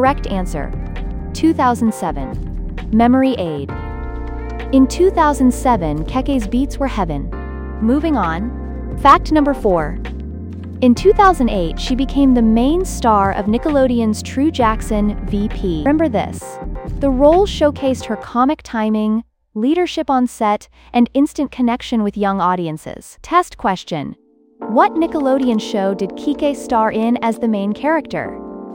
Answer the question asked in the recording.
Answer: True Jackson, VP.